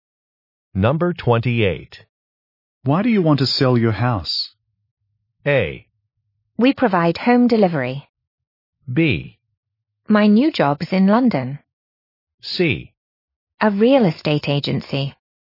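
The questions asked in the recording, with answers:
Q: Why do you want to sell your house?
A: B: My new job's in London.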